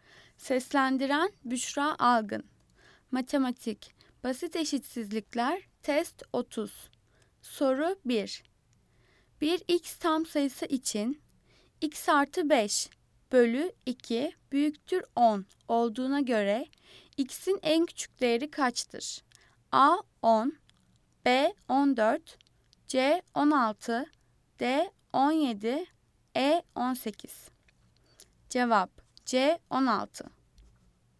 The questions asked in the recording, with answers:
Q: Bir x tam sayısı için x artı 5 bölü 2 büyüktür 10 olduğuna göre x'in en küçük değeri kaçtır?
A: Cevap C 16.